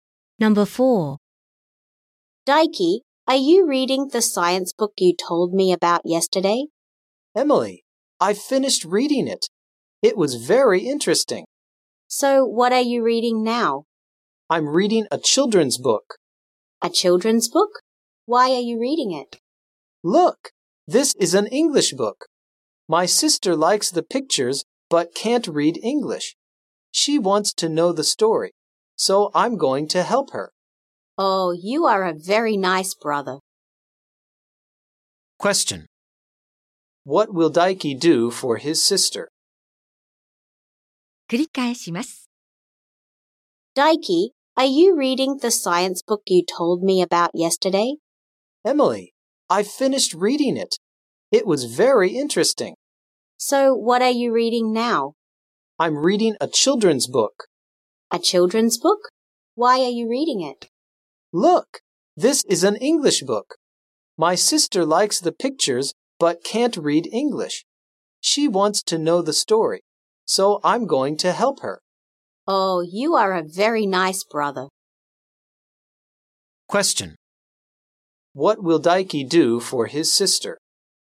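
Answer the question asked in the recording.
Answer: He will help her understand the story of the English book.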